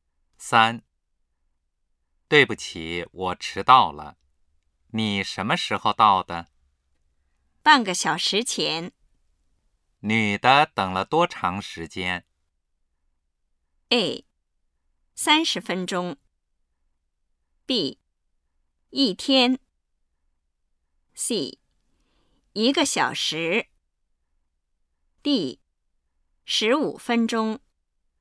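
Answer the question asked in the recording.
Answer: A: 30分钟。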